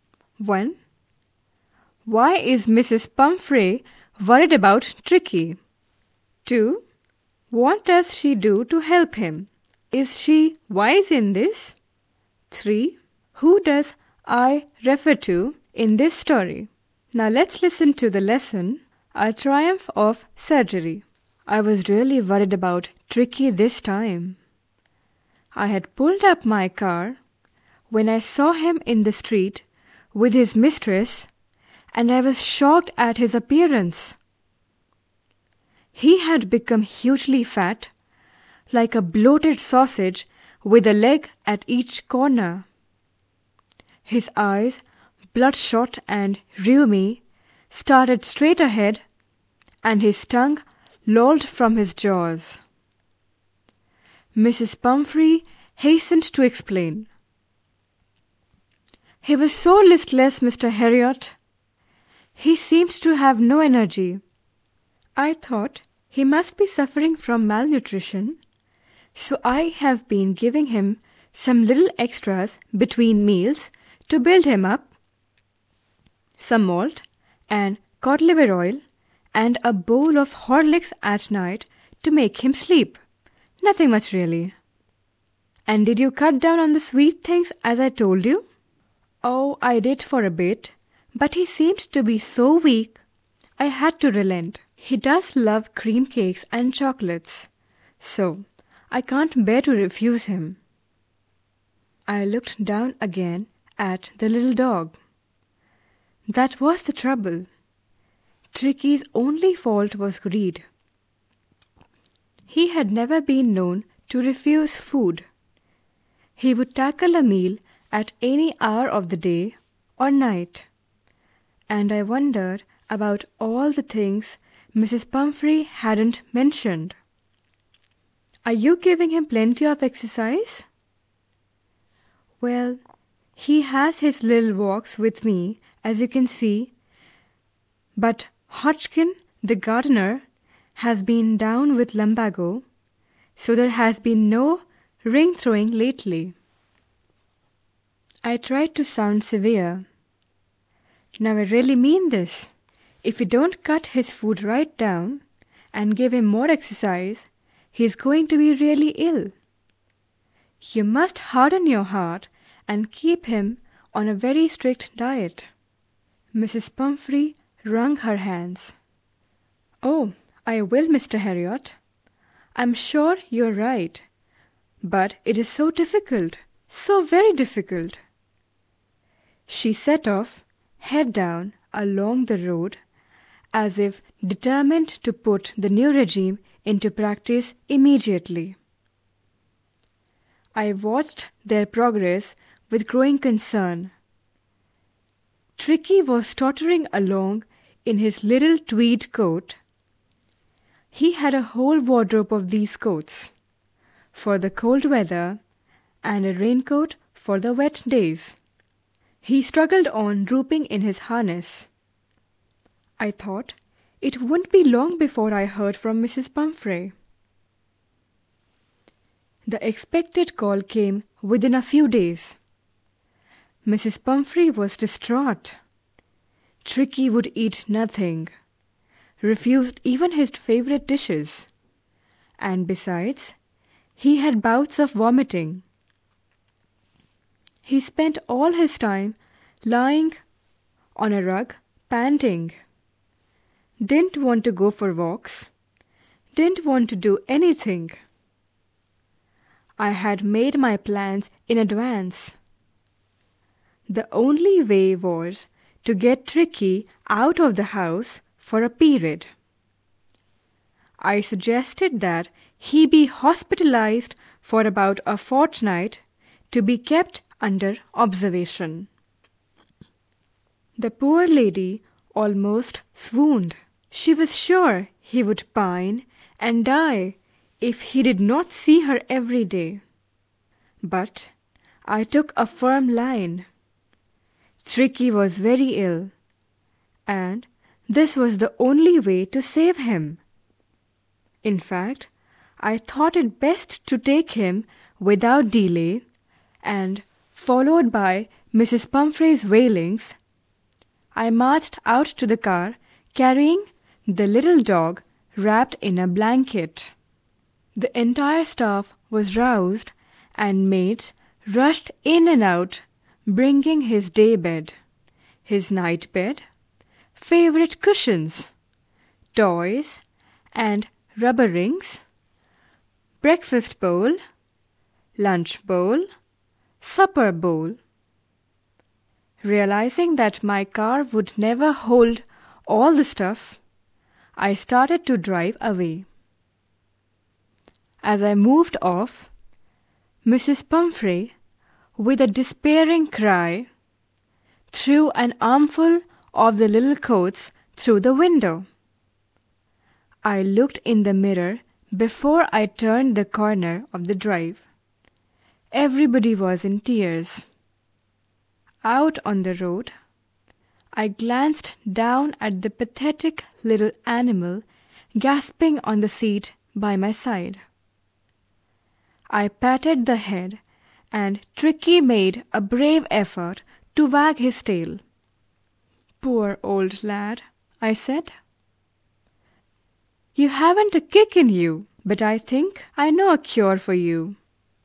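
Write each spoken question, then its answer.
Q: Why is Mrs. Pumphrey worried about Tricky?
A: He has grown hugely fat and looks unwell; she thinks he is listless and has no energy

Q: What does she do to help him?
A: She gives him extras between meals, like malt, cod liver oil, Horlicks, cream cakes and chocolates. This is not wise.

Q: Who does I refer to in this story?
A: The narrator, Mr. Herriot, the vet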